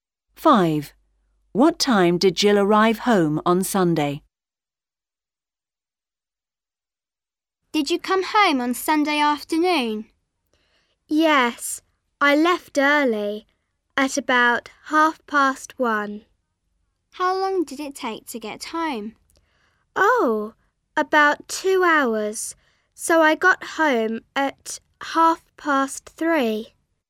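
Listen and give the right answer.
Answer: At 3:30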